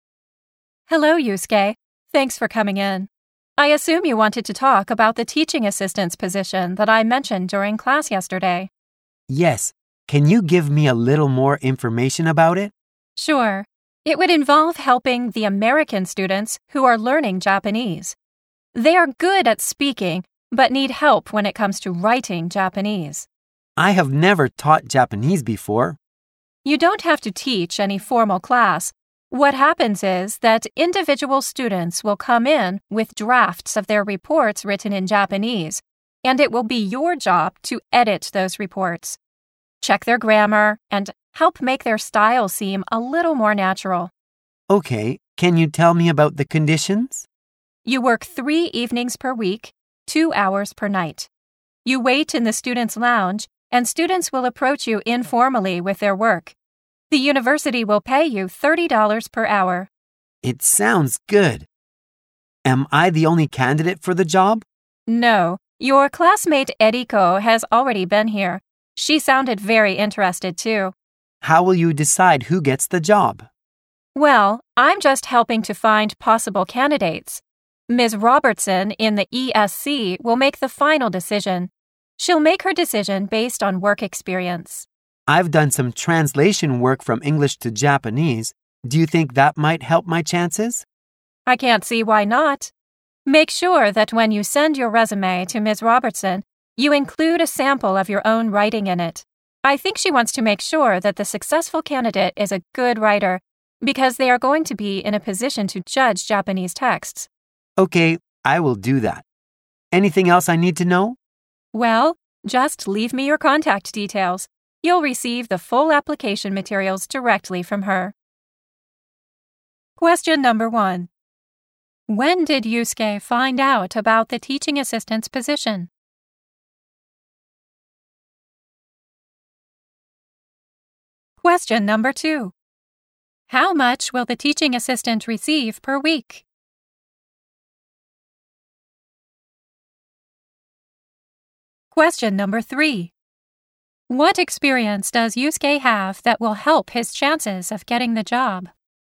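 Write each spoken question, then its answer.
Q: When did Yusuke find out about the teaching assistant's position?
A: Yesterday, during class.

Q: How much will the teaching assistant receive per week?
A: $180 (3 evenings x 2 hours x $30).

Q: What experience does Yusuke have that will help his chances of getting the job?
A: He has done translation work from English to Japanese.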